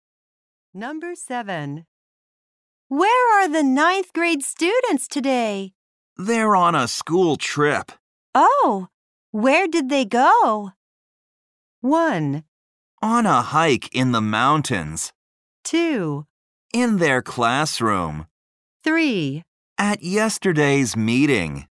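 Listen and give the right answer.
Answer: 1: On a hike in the mountains.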